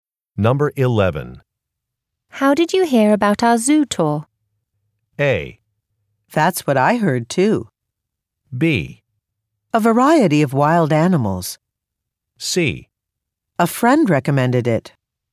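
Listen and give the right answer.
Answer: C: A friend recommended it.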